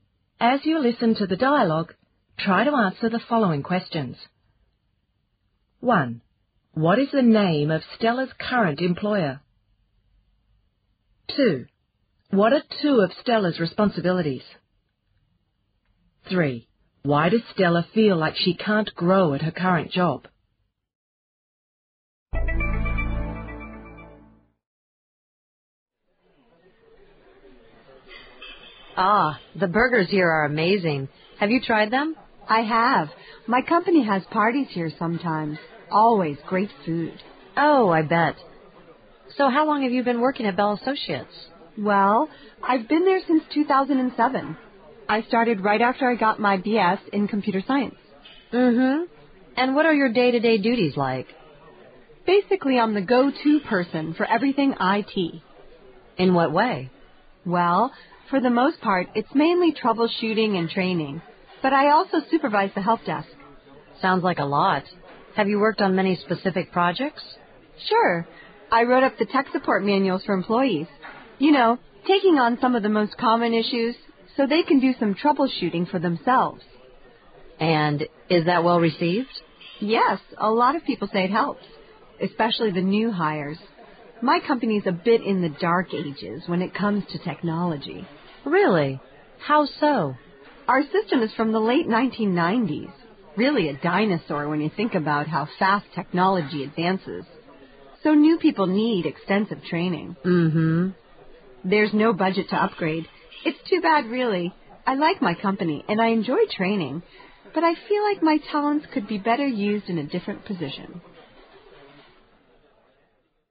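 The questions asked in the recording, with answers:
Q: What is the name of Stella's current employer?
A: Bell Associates

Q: What are two of Stella's responsibilities?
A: Troubleshooting and training (she also supervises the help desk)

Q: Why does Stella feel like she can't grow at her current job?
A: The company's IT system is outdated (from the late 1990s) and there's no budget to upgrade, so her talents aren't well used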